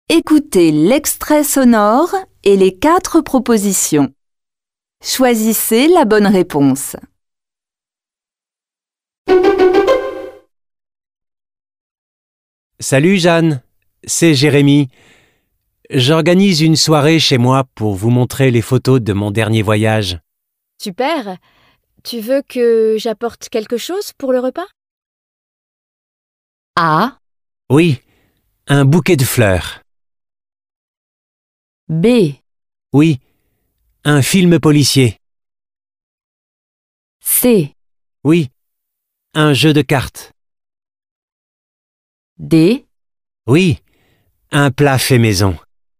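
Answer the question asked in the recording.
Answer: D: Oui, un plat fait maison.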